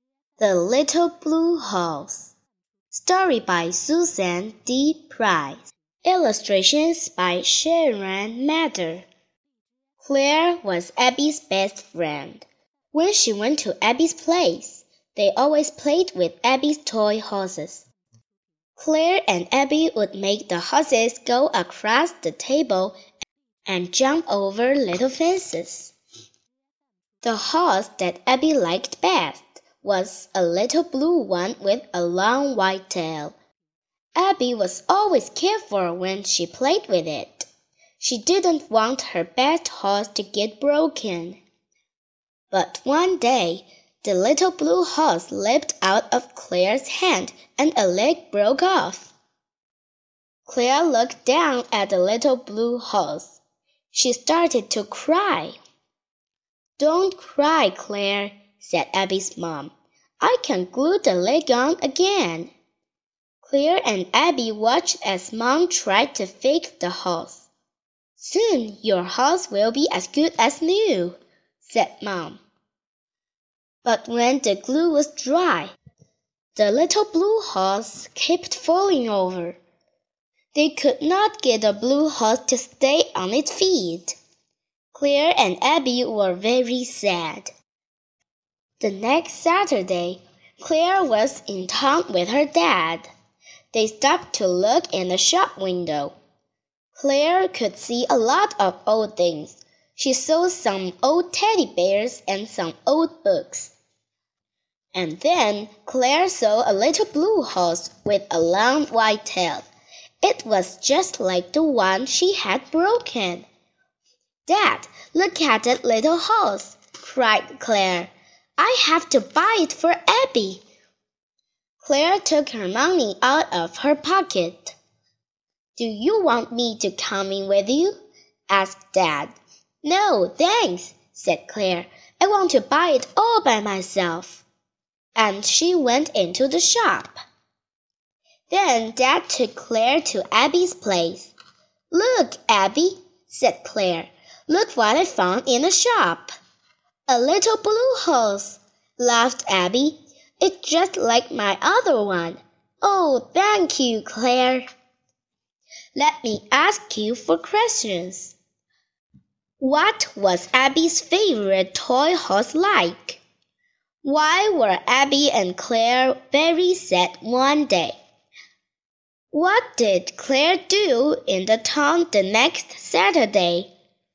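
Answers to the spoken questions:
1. A little blue horse with a long white tail.
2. Claire broke a leg off the little blue horse and they couldn't fix it.
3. She bought a little blue horse for Abby with her own money.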